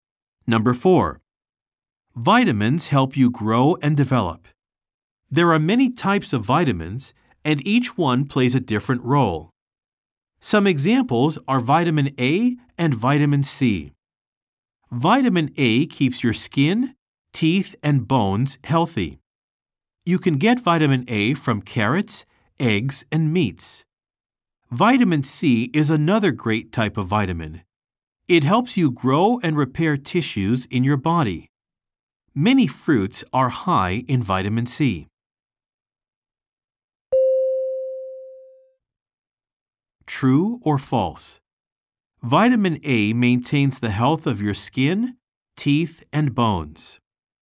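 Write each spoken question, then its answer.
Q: True or false? Vitamin A maintains the health of your skin, teeth, and bones.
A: True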